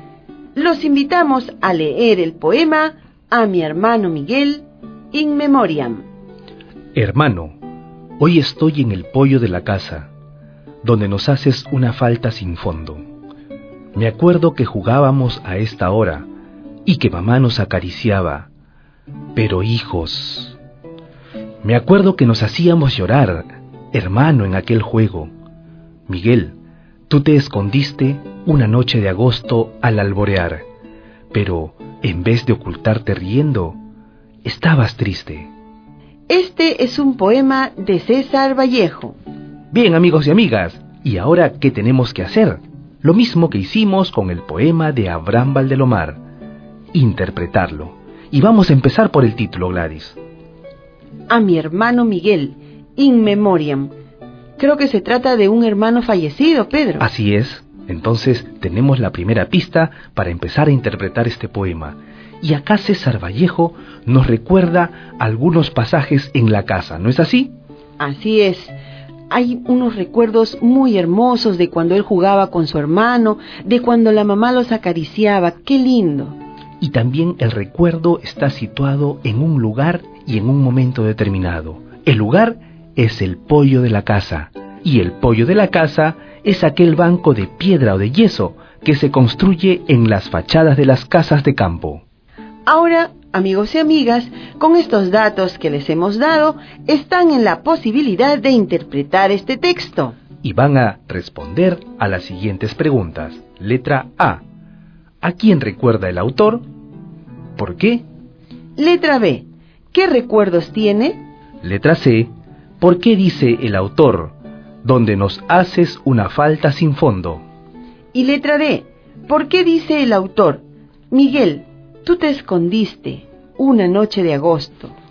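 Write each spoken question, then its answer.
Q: ¿A quién recuerda el autor?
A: A su hermano Miguel, que ha fallecido

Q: ¿Qué recuerdos tiene?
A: Que jugaba con su hermano en el poyo de la casa y que su mamá los acariciaba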